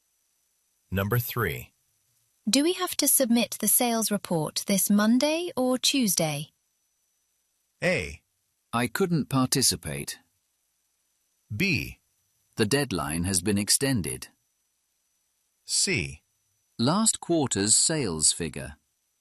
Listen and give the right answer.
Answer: 역시 이런 시간적인 표현, 시점적인 표현의 정답으로 가능하겠습니다.